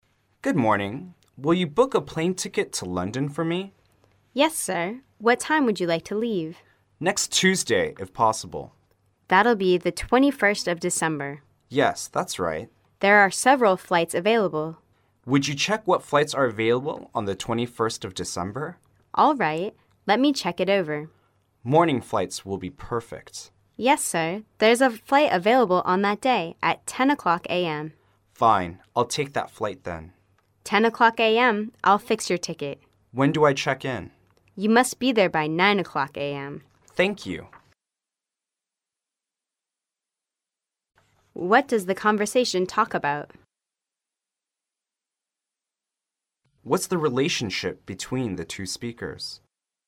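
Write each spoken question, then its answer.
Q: What does the conversation talk about?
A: Booking a plane ticket to London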